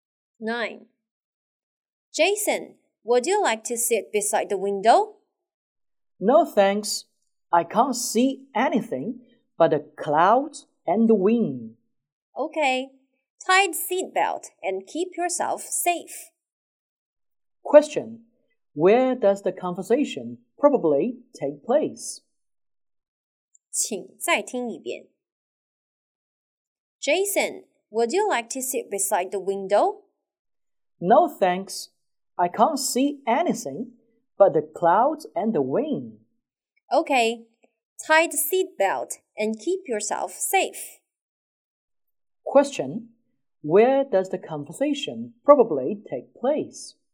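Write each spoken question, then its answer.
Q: Where does the conversation probably take place?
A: On a plane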